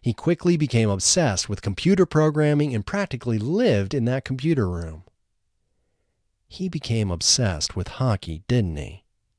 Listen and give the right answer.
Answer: No, he didn't become obsessed with hockey.